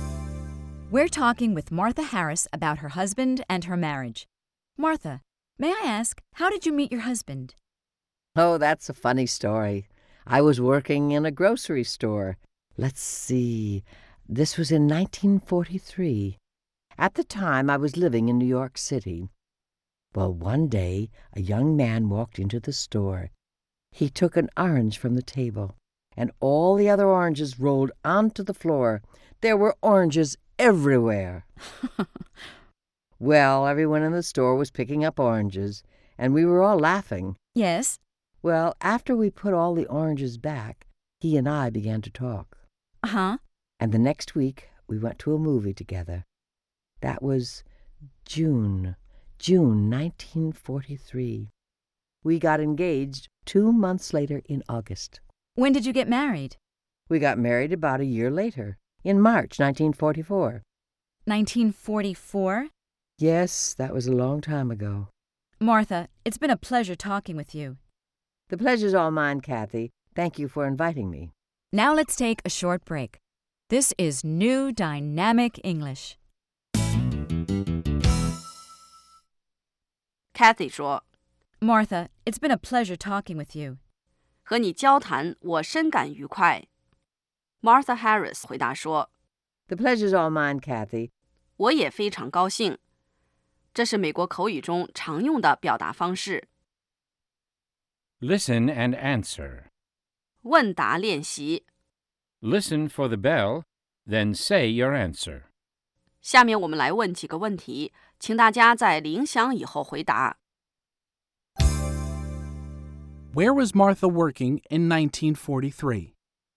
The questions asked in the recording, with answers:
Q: Where was Martha working in 1943?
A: In 1943, she was working in a grocery store.